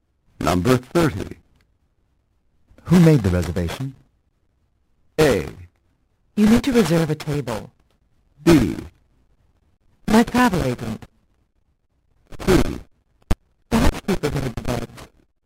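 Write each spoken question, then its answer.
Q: Who made the reservation?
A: B: My travel agent.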